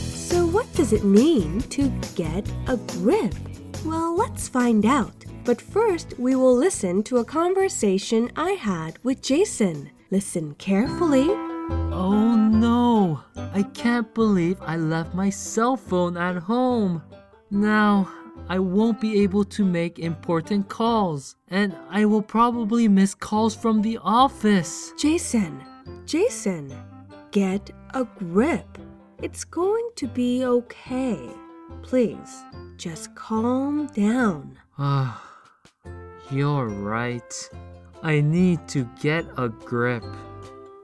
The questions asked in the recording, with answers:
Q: What does it mean to get a grip?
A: To get a grip means to make an effort to control your emotions.